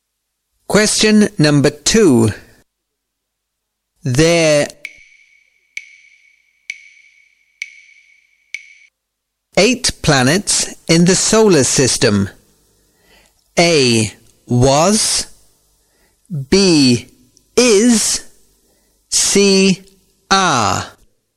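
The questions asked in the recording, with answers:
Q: There. Eight planets in the solar system.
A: C: Are.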